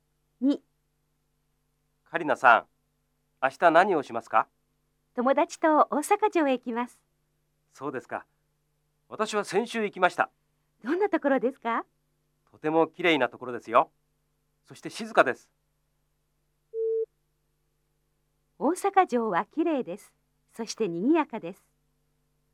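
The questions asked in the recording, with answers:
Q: 大阪城はきれいです。そしてにぎやかです。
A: ×(静かです)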